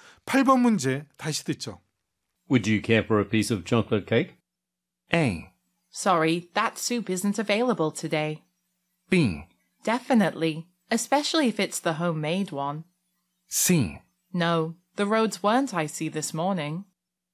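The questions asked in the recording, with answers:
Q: Would you care for a piece of chocolate cake?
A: B: Definitely, especially if it's the homemade one.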